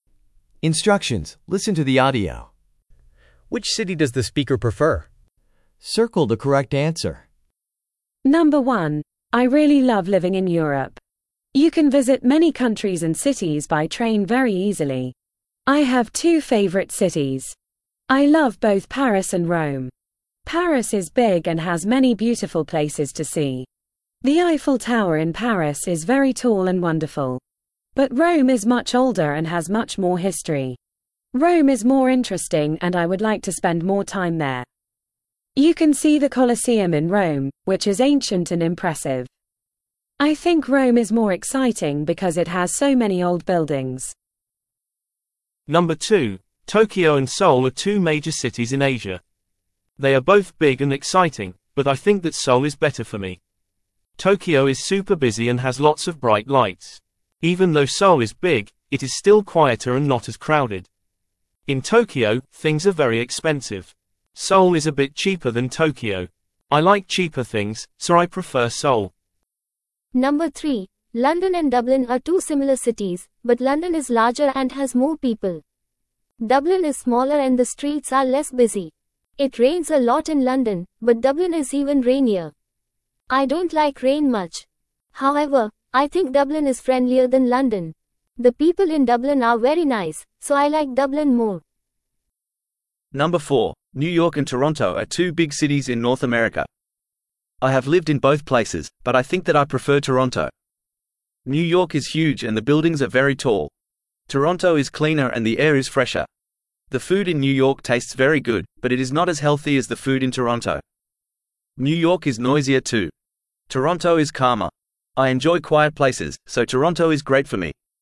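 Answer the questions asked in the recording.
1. Rome
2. Seoul
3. Dublin
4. Toronto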